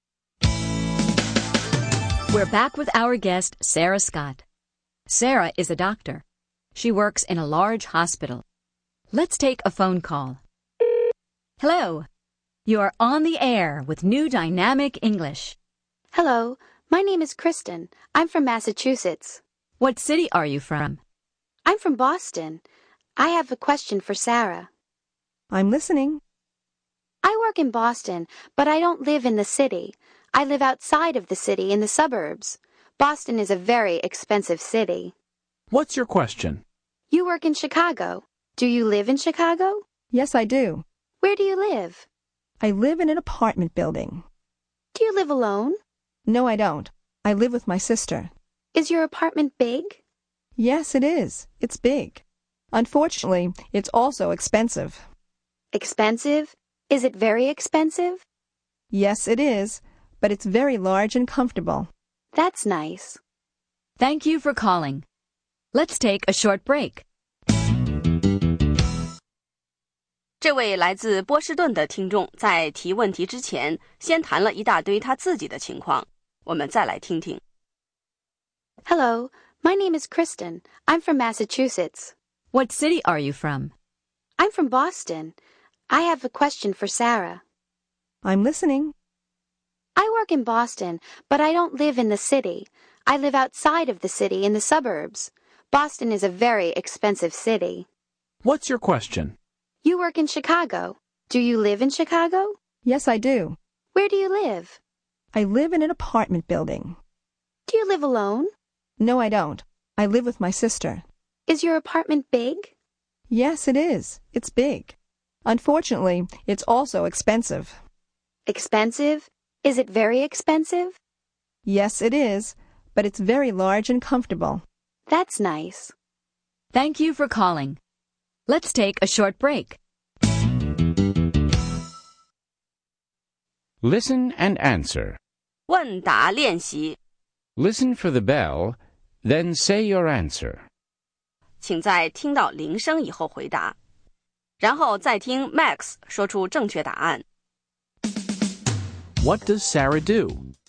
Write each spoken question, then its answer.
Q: What does Sarah do?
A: She's a doctor.